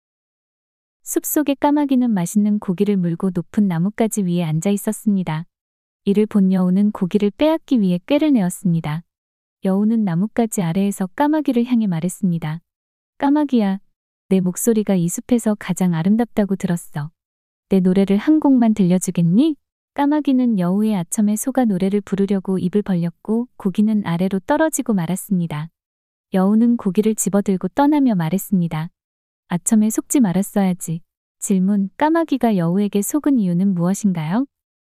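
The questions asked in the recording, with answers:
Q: 까마귀가 여우에게 속은 이유는 무엇인가요?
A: 여우의 아첨(목소리가 아름답다는 칭찬)에 넘어가서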